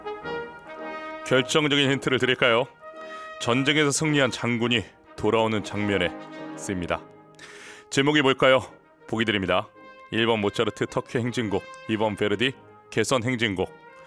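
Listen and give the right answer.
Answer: 2번: 베르디 개선 행진곡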